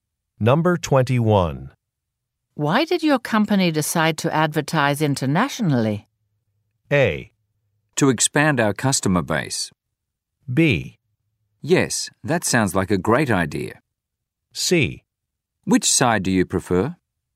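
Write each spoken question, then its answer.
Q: Why did your company decide to advertise internationally?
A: A: To expand our customer base.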